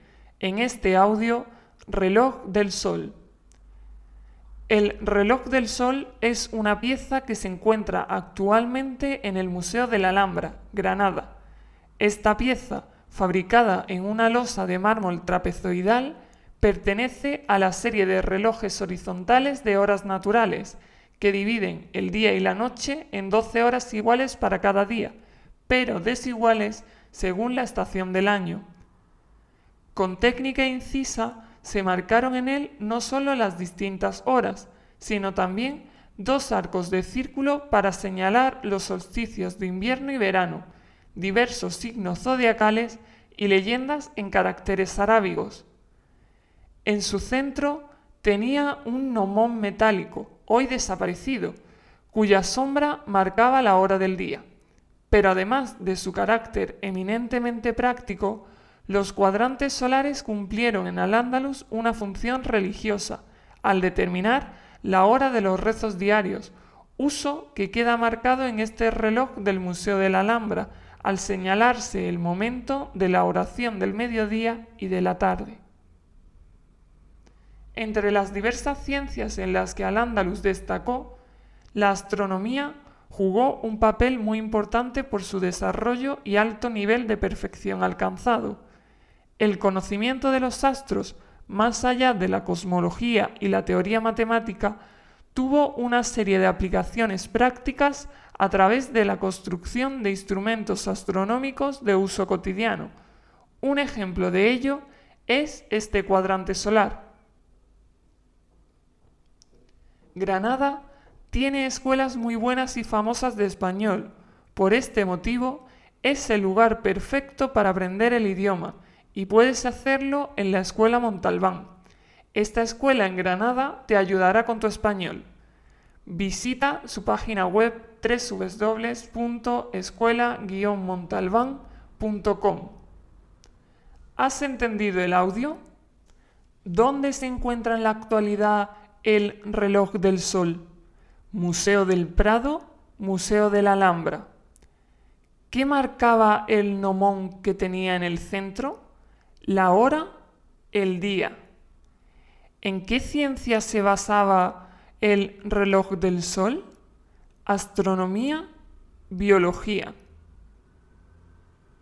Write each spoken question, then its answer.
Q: ¿Dónde se encuentra en la actualidad el reloj del sol, Museo del Prado, Museo de la Alhambra.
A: Museo de la Alhambra

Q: ¿Qué marcaba el nomón que tenía en el centro?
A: la hora

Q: ¿En qué ciencia se basaba el reloj del sol?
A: astronomía